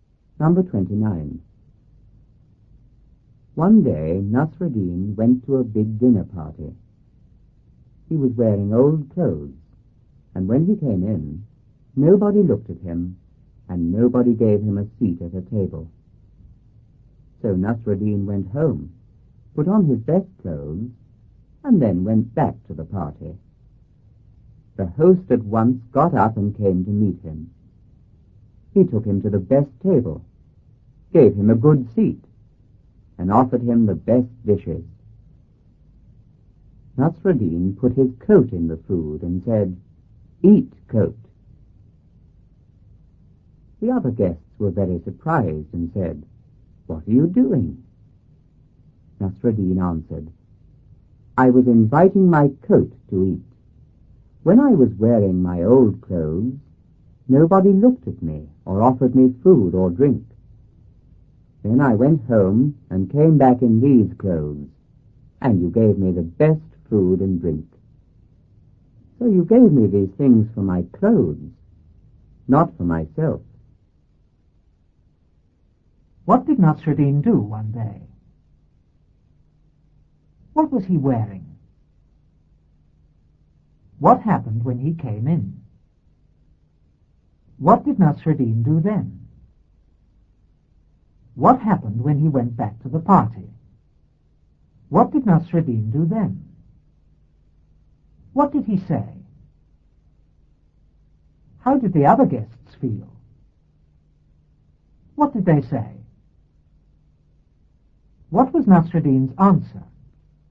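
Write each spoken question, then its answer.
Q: What did Nasreddin do one day?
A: He went to a big dinner party.

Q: What was he wearing?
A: Old clothes.

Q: What happened when he came in?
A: Nobody looked at him and nobody gave him a seat at a table.

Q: What did Nasreddin do then?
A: He went home, put on his best clothes and went back to the party.

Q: What happened when he went back to the party?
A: The host came to meet him, took him to the best table, gave him a good seat and offered him the best dishes.

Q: What did Nasreddin do then?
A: He put his coat in the food.

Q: What did he say?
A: "Eat, coat."

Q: How did the other guests feel?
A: Very surprised.

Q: What did they say?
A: "What are you doing?"

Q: What was Nasreddin's answer?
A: He was inviting his coat to eat, because they gave him the food for his clothes, not for himself.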